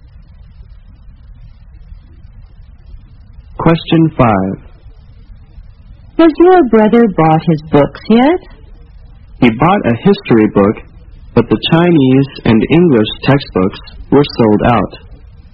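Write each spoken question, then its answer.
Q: Which book has the man's brother got?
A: A history book.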